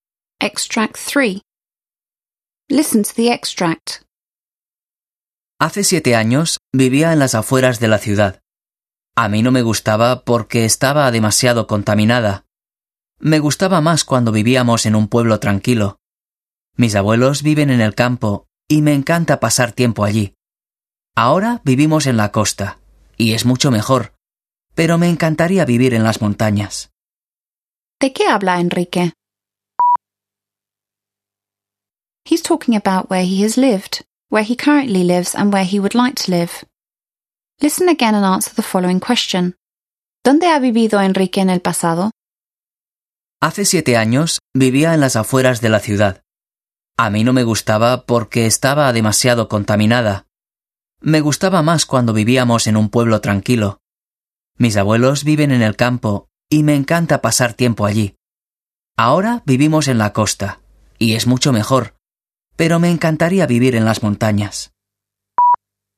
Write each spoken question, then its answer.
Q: ¿De qué habla Enrique?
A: He's talking about where he has lived, where he currently lives, and where he would like to live.

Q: ¿Dónde ha vivido Enrique en el pasado?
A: The answer is, in the past he has lived on the outskirts of the city and in a quiet town.